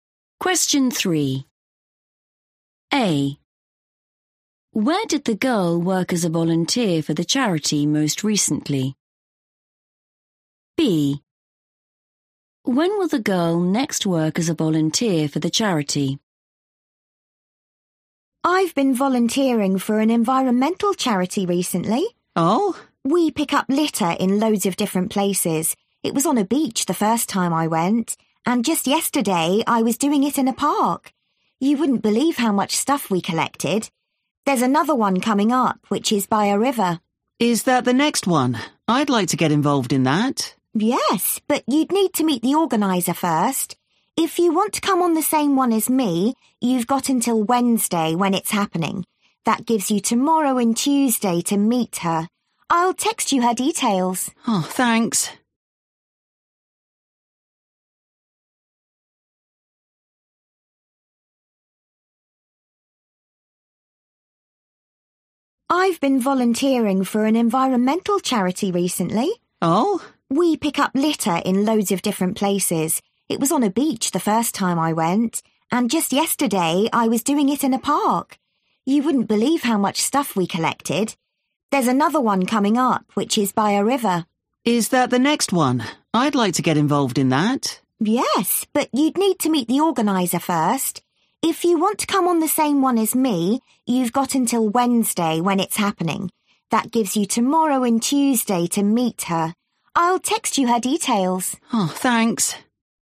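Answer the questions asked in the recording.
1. in a park
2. Wednesday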